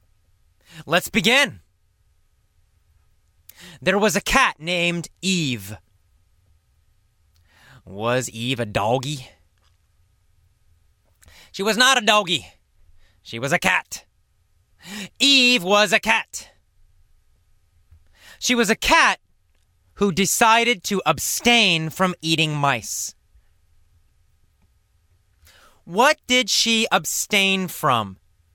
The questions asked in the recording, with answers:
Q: What did she abstain from?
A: She abstained from eating mice.